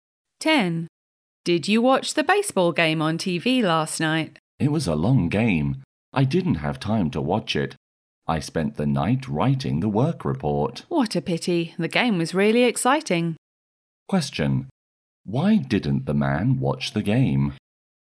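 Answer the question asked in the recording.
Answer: He spent the night writing the work report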